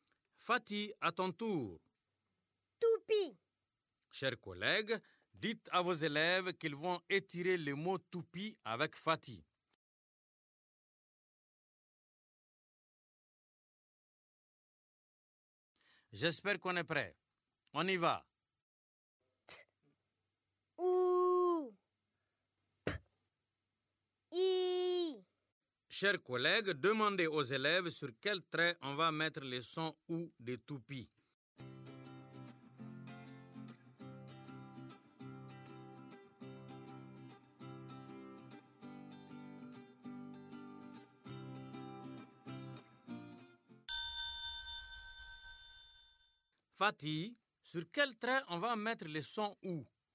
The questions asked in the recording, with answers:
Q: Fatih, sur quel trait on va mettre le son « ou »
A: Monsieur, on va mettre le son « ou » sur le deuxième trait.